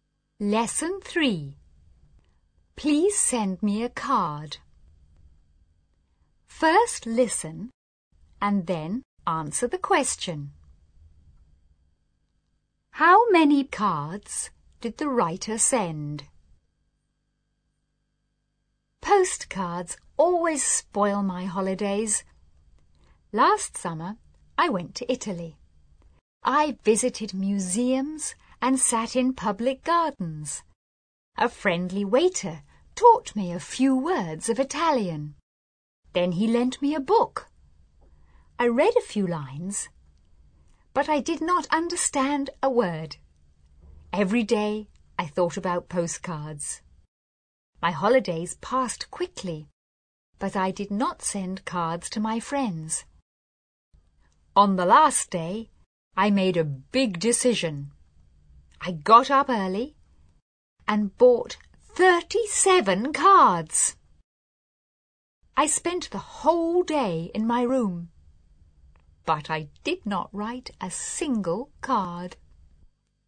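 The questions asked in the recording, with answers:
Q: How many cards did the writer send?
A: None; the writer did not send any cards.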